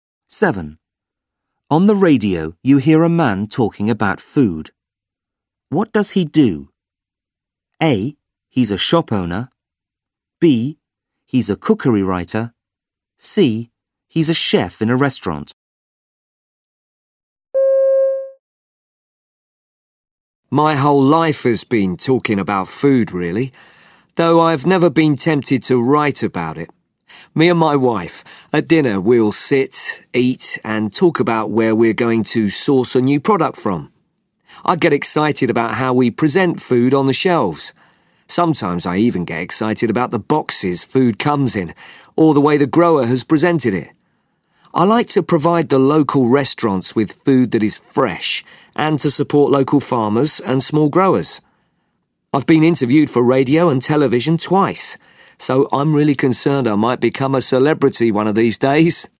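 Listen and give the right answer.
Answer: A: He's a shop owner.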